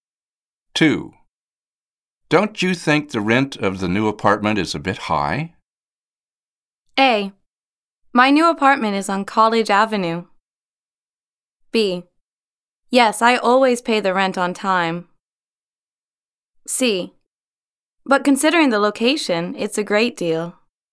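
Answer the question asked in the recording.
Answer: C: But considering the location, it's a great deal.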